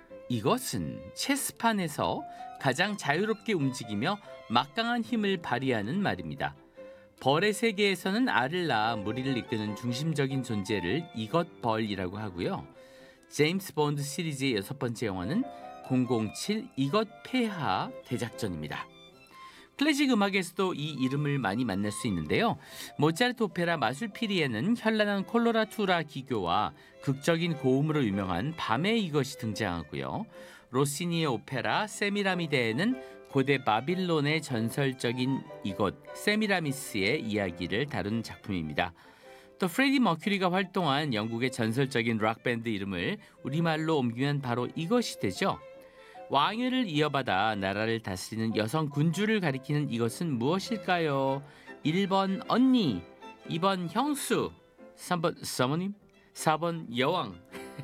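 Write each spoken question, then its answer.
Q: 왕위를 이어받아 나라를 다스리는 여성 군주를 가리키는 이것은 무엇일까요?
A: 4: 여왕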